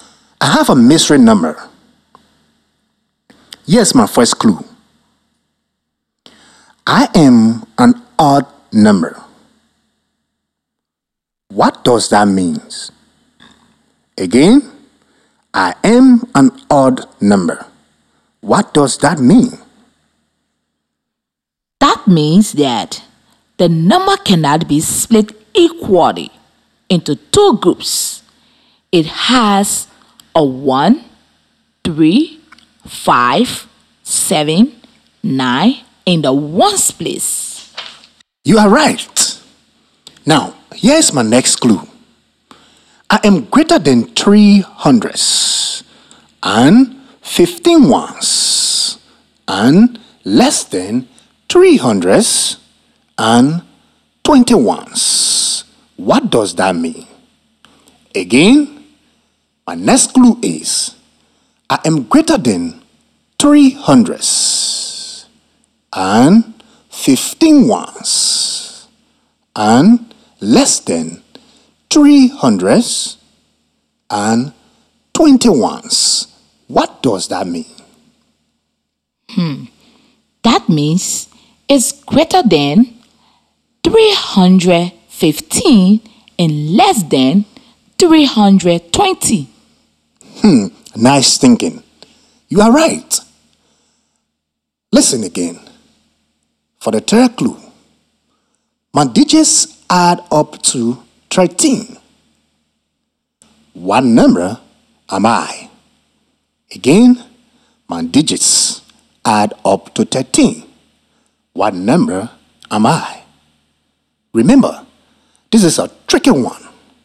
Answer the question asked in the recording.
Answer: 319